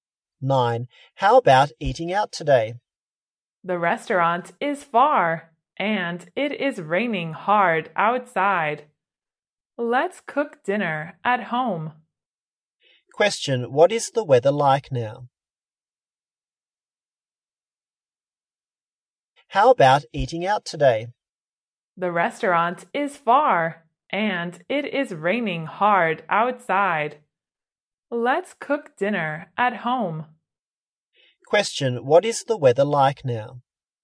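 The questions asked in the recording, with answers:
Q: what is the weather like now?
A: It is raining hard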